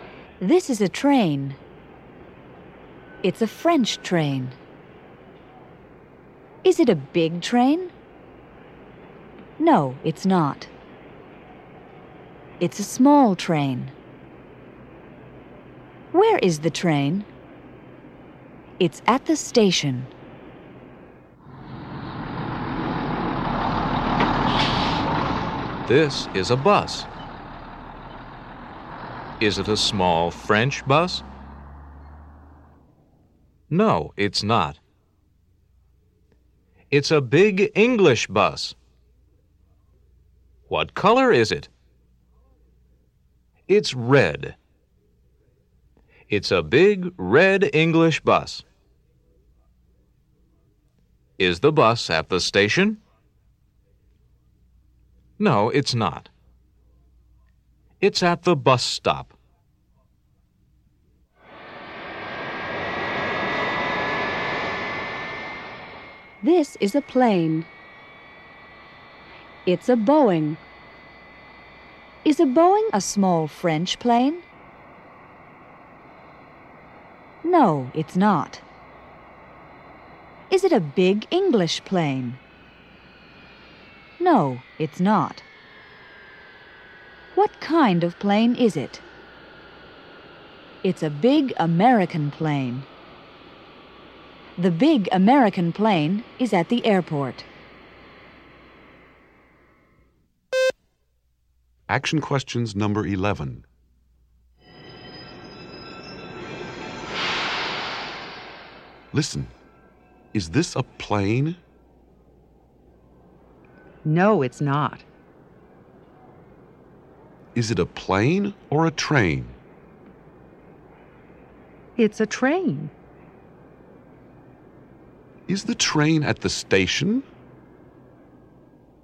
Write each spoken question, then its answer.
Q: Is the train at the station?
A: Yes, it is.